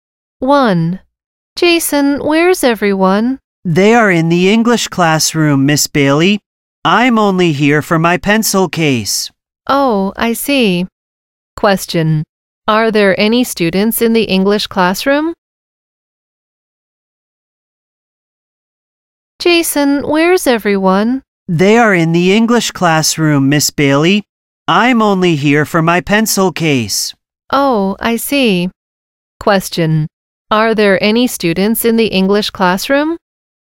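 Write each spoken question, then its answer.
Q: Are there any students in the English classroom?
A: Yes, there are.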